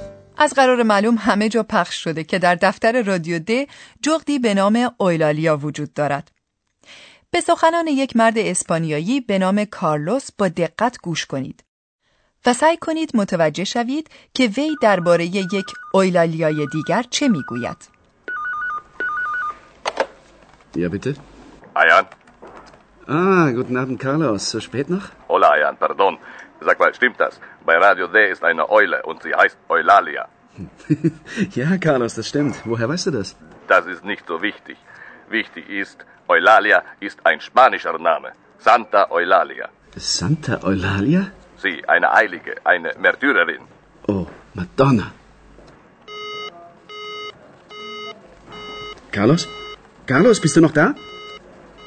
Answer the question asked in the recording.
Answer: کارلوس از سانتا اویلالیا سخن میگوید که به معنی اویلالیای مقدس است.